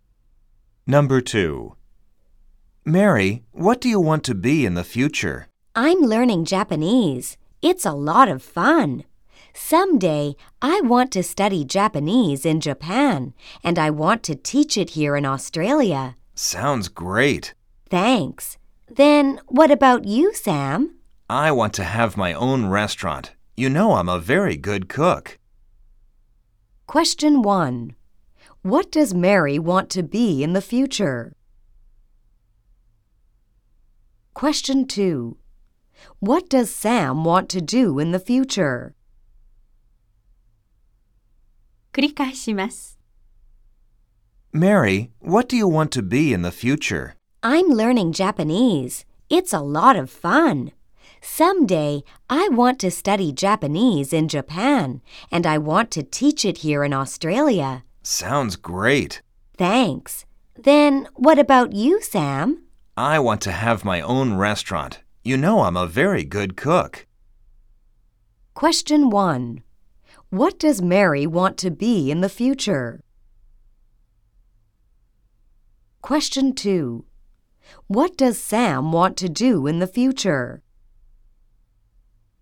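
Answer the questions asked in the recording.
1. A Japanese teacher.
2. He wants to have his own restaurant.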